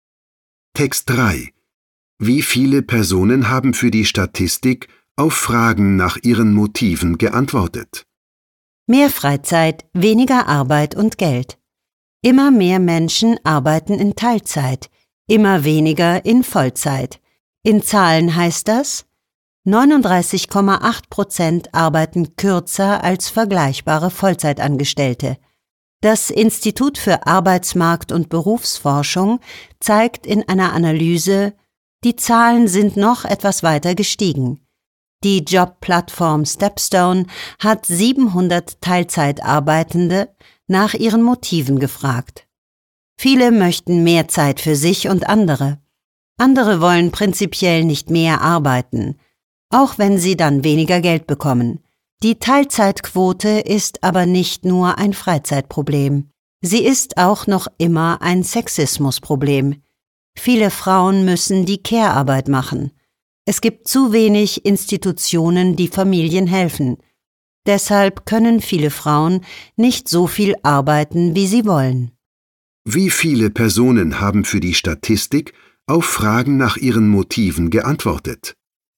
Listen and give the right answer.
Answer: 700 Teilzeitarbeitende haben für die Statistik auf Fragen nach ihren Motiven geantwortet.